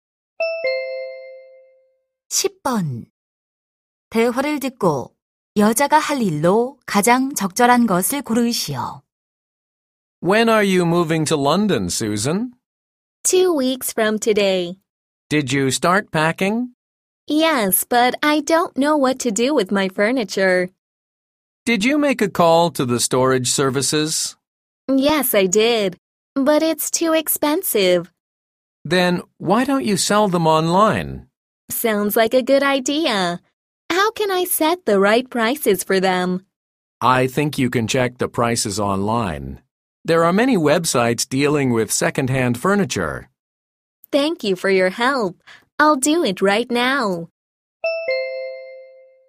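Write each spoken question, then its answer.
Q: 대화를 듣고 여자가 할 일로 가장 적절한 것을 고르시오.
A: 온라인에서 중고 가구 가격 확인하기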